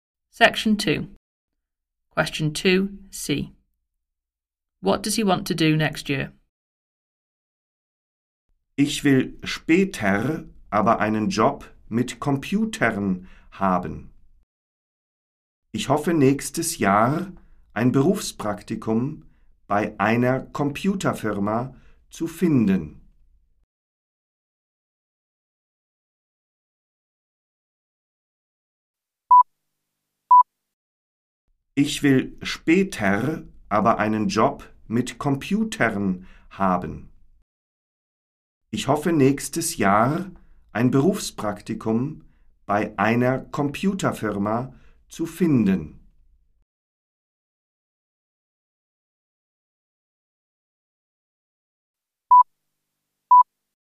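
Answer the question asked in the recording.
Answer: Find work experience at a computer company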